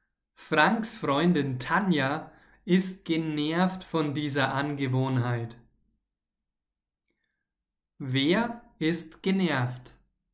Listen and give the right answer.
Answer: Franks Freundin Tanja. Tanja ist genervt.